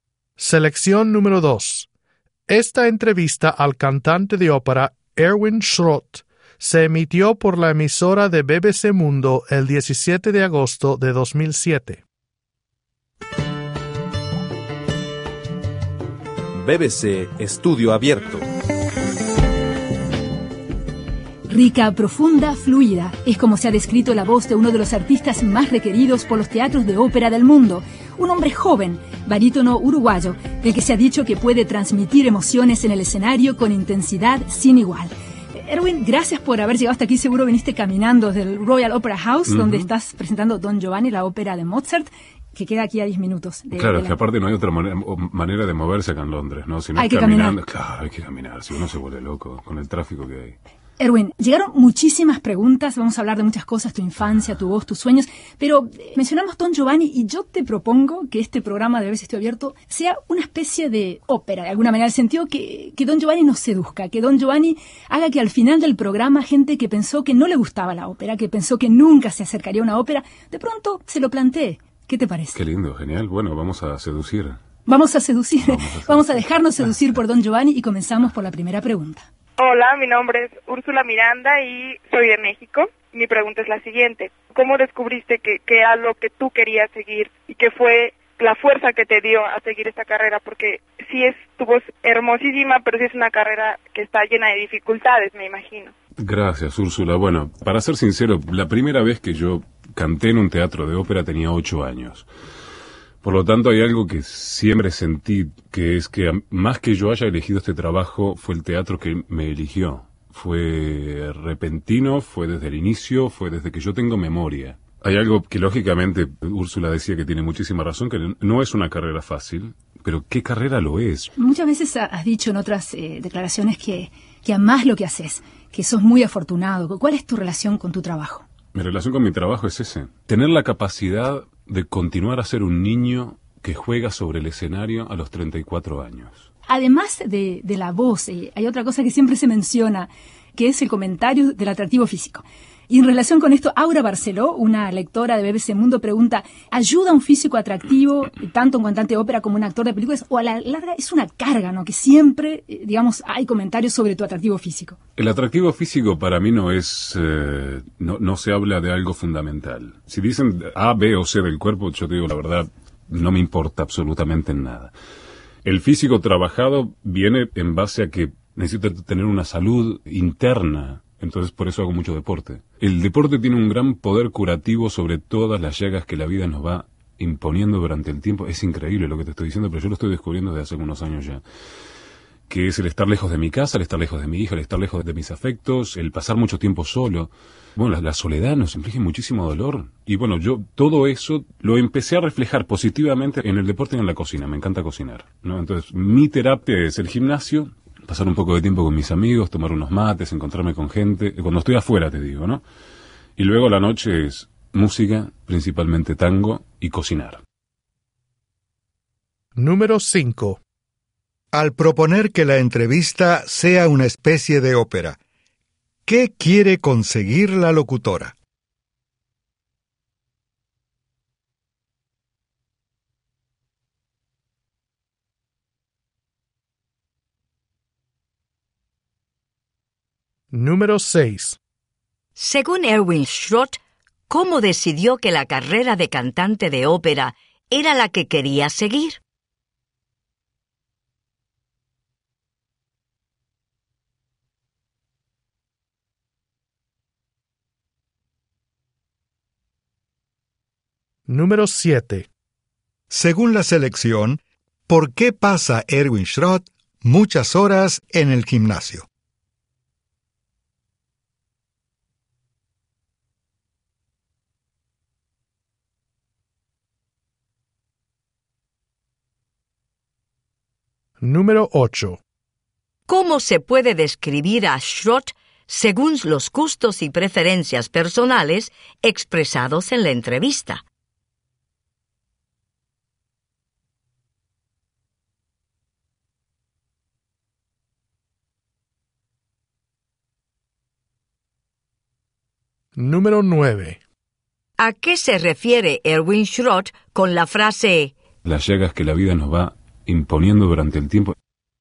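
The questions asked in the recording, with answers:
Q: Al proponer que la entrevista sea una especie de ópera, ¿qué quiere conseguir la locutora?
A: Que la gente a la que no le gustaba la ópera se interese por ella

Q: Según Erwin Schrott, ¿cómo decidió que la carrera de cantante de ópera era la que quería seguir?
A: No la eligió él; el teatro lo eligió a él desde niño (cantó en la ópera a los 8 años)

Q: Según la selección, ¿por qué pasa Erwin Schrott muchas horas en el gimnasio?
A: Para tener salud interna y como terapia contra la soledad de estar lejos de casa

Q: ¿Cómo se puede describir a Schrott según los gustos y preferencias personales expresados en la entrevista?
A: Le gustan el deporte, la cocina, el tango y tomar mate con amigos

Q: ¿A qué se refiere Erwin Schrott con la frase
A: Al dolor y las dificultades de la vida, como la soledad y estar lejos de sus seres queridos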